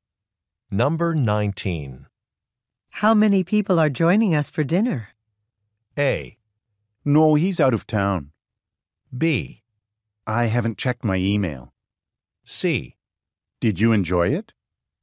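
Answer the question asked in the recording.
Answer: B: I haven't checked my email.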